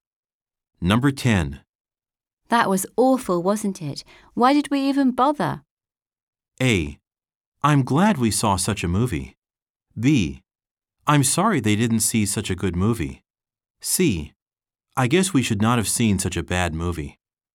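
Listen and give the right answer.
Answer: C: I guess we should not have seen such a bad movie.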